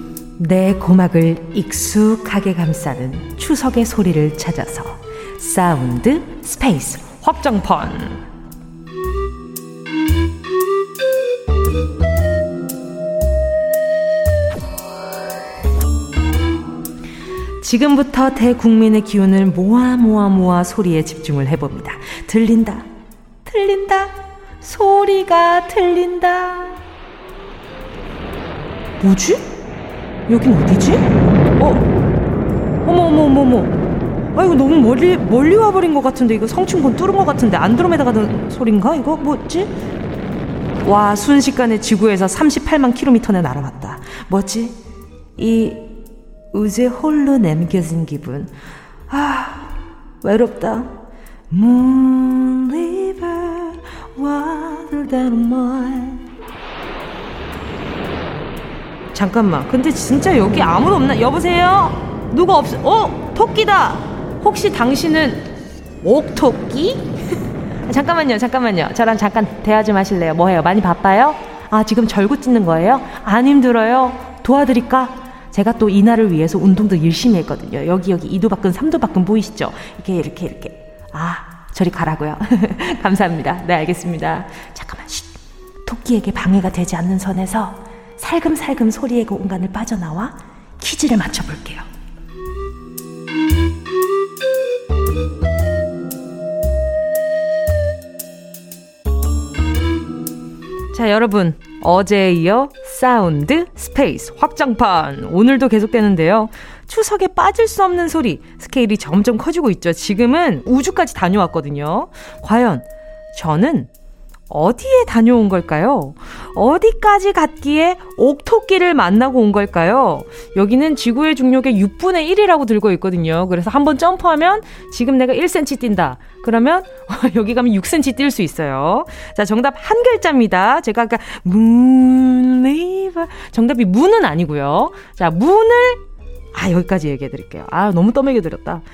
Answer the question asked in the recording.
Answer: 이 소리의 정체는 바로 달에 가는 소리였습니다.